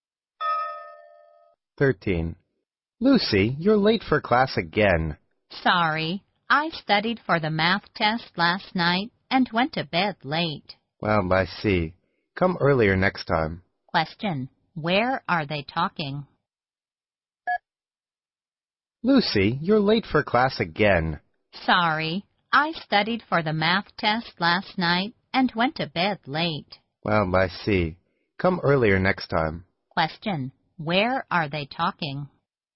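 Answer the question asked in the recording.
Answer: At school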